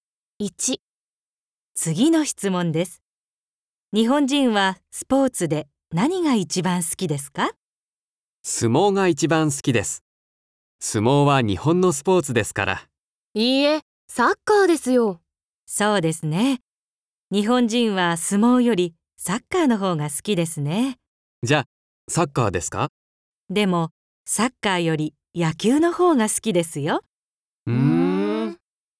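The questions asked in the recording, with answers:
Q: 日本人はスポーツで何が一番好きですか?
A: 野球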